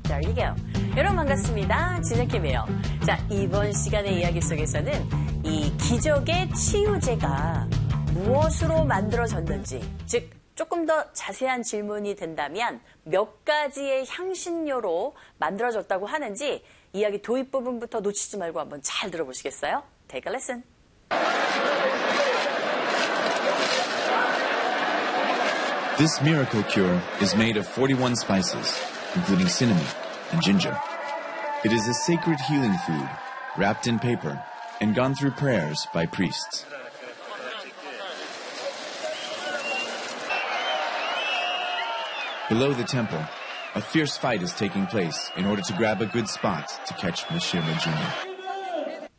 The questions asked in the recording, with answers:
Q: 이 기적의 치유제가 무엇으로 만들어졌는지, 즉 조금 더 자세한 질문이 된다면 몇 가지의 향신료로 만들어졌다고 하는지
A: 바로 41가지의 향신료로 만들어졌다고 합니다.